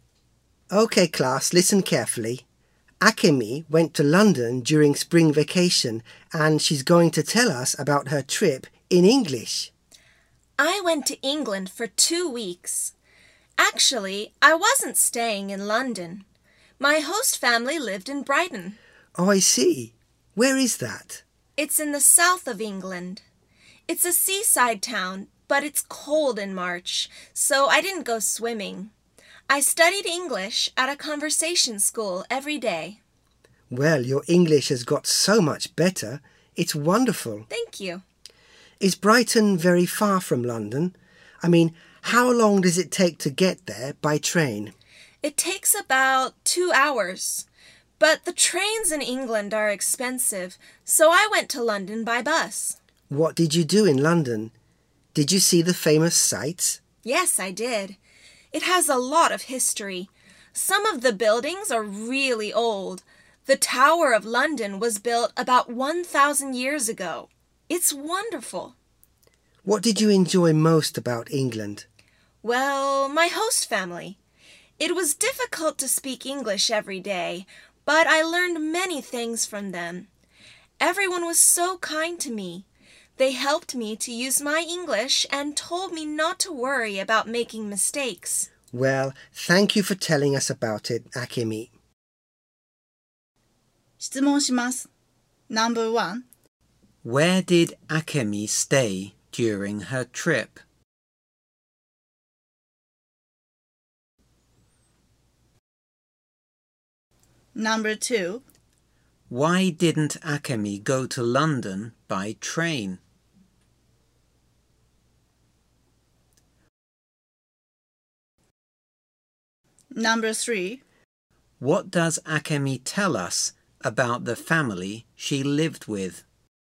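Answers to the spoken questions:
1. In Brighton, with a host family
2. Because trains in England are expensive
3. They were very kind and helped her use her English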